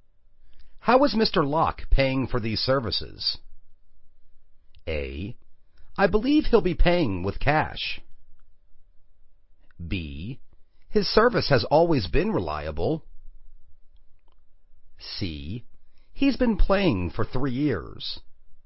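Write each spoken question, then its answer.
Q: How is Mr. Locke paying for these services?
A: A: I believe he'll be paying with cash.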